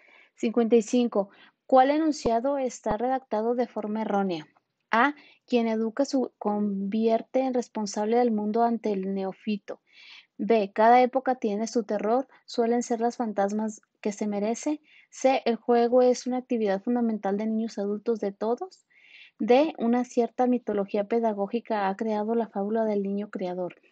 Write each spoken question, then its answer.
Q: ¿Cuál enunciado está redactado de forma errónea?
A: Y la respuesta correcta es la B.